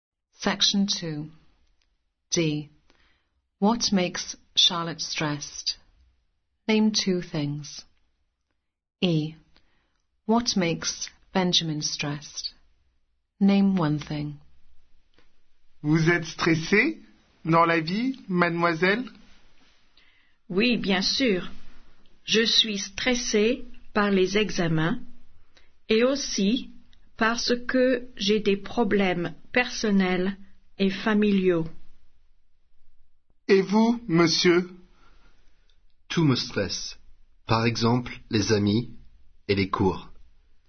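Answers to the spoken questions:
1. Exams and personal/family problems
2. Friends or lessons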